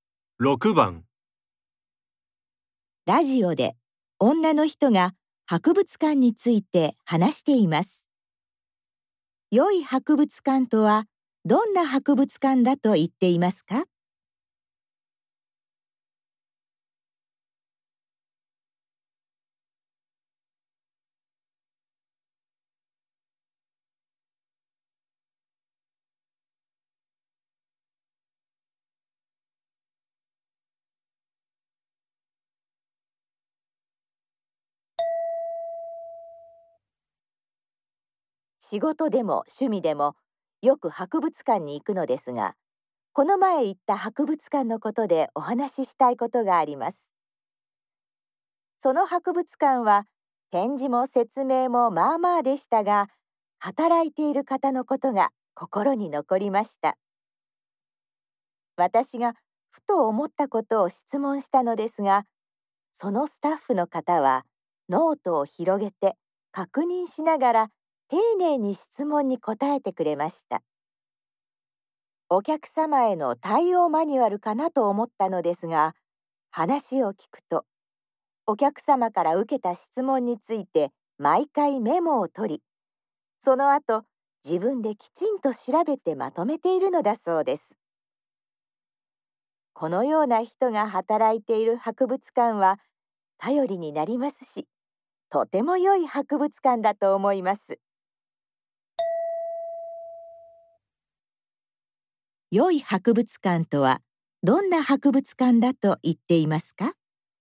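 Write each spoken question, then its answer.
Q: 良い博物館とはどんな博物館だと言っていますか?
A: 客から受けた質問をメモし、自分で調べてまとめるような頼りになるスタッフが働いている博物館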